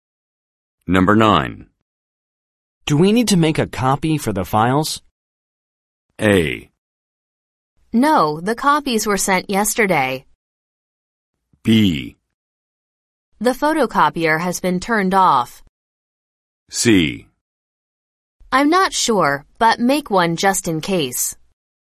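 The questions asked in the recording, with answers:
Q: Do we need to make a copy for the files?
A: C: I'm not sure, but make one just in case.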